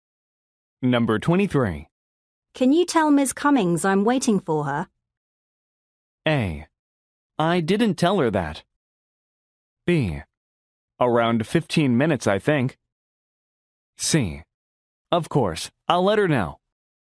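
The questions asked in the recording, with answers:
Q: Can you tell Ms. Cummings I'm waiting for her?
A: C: Of course, I'll let her know.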